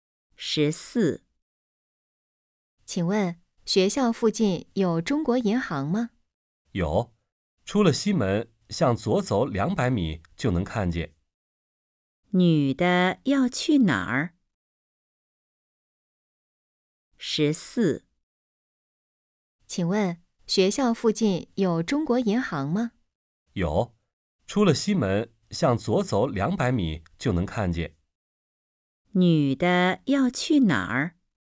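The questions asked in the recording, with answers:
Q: 女的要去哪儿?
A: 中国银行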